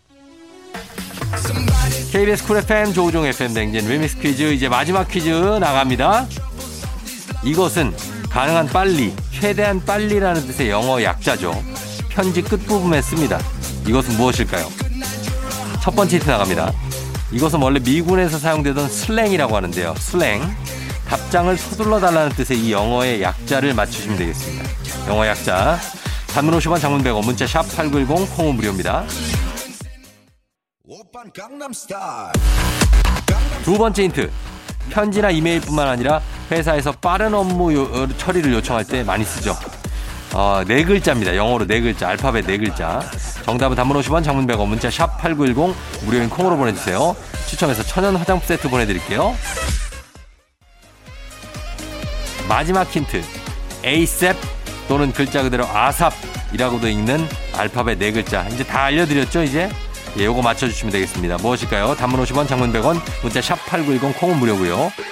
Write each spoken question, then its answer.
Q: 답장을 서둘러 달라는 뜻의 이 영어의 약자를 맞추시면 되겠습니다.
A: 정답은 바로 바로 바로 바로 바로 바로, 바로 ASAP입니다.